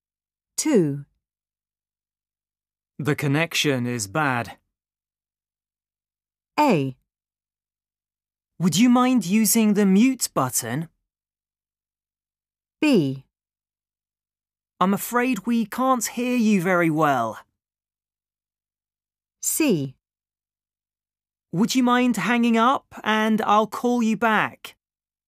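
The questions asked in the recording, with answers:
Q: The connection is bad.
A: C: Would you mind hanging up and I'll call you back?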